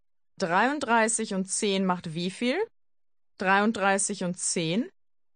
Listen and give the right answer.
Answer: 43. 33 und 10 macht 43.